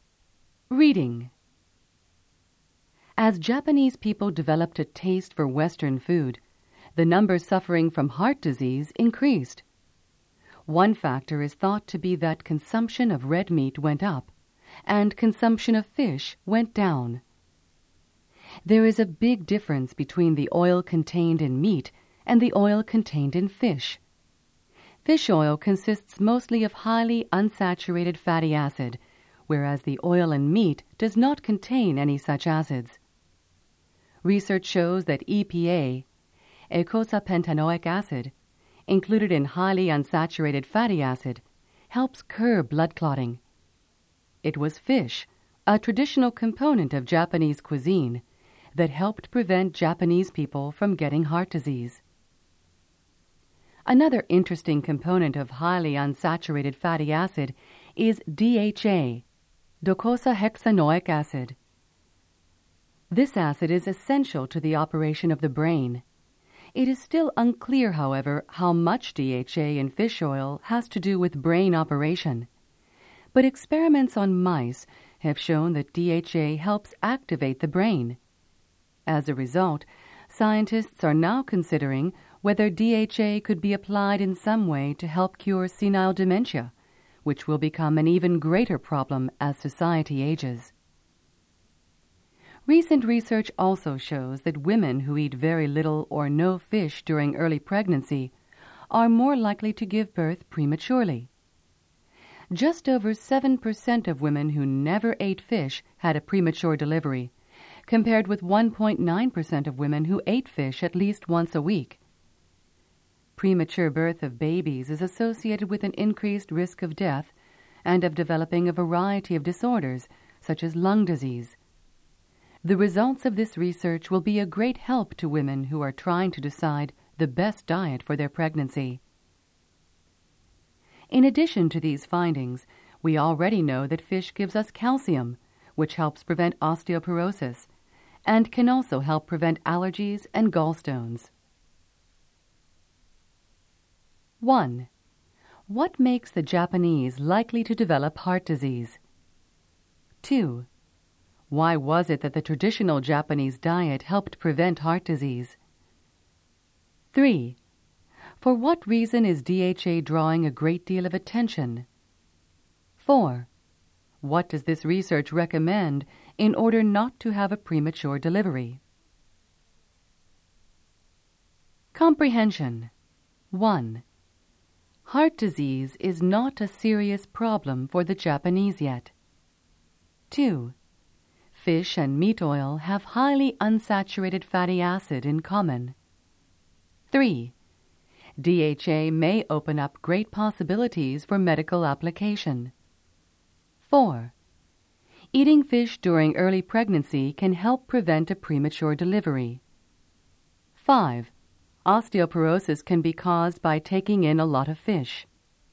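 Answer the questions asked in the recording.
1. Eating more red meat and less fish as they developed a taste for Western food
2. It included fish, whose oil contains EPA, which helps curb blood clotting
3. It helps activate the brain and might be used to help cure senile dementia
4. Eating fish at least once a week during early pregnancy
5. False
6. False
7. True
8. True
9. False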